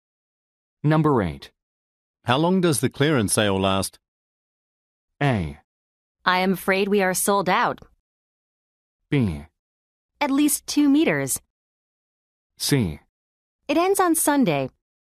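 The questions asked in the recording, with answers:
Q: How long does the clearance sale last?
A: C: It ends on Sunday.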